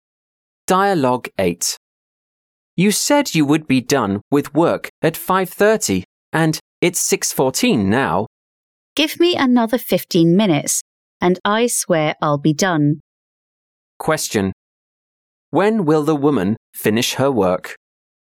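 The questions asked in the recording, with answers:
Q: When will the woman finish her work?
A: At 6:29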